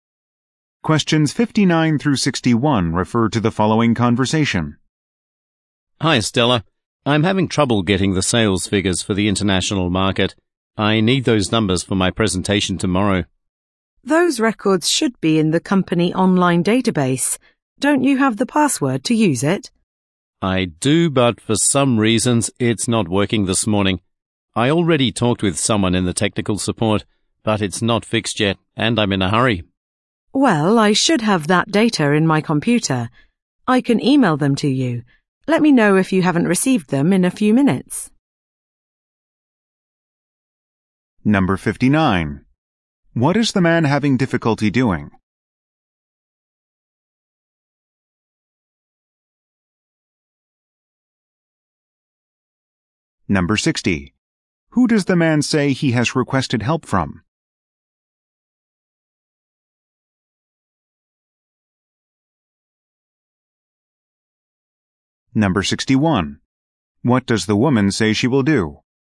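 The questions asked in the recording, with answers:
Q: What is the man having difficulty doing?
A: Getting sales figures from the online database

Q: Who does the man say he has requested help from?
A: Technical support

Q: What does the woman say she will do?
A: Email him the data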